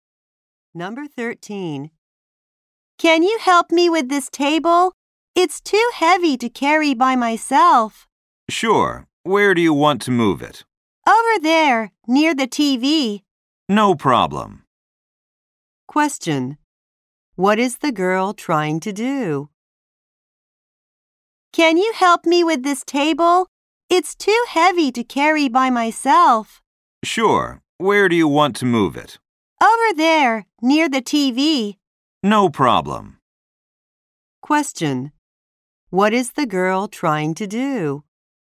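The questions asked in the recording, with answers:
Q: What is the girl trying to do?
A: Move a table.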